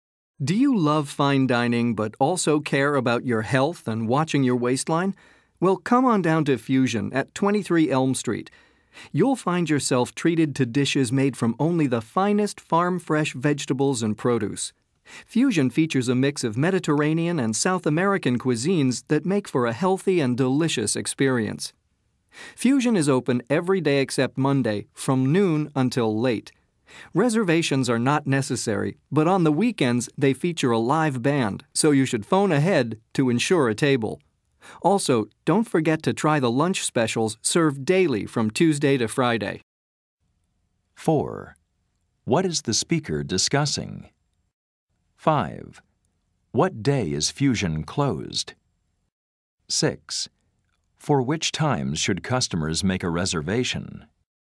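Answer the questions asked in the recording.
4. A restaurant, Fusion
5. Monday
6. Weekends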